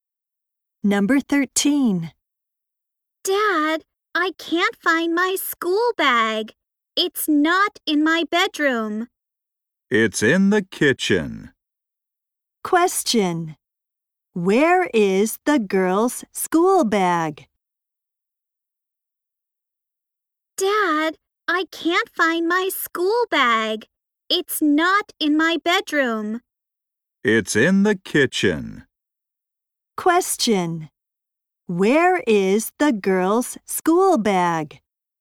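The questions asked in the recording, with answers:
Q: Where is the girl's school bag?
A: In the kitchen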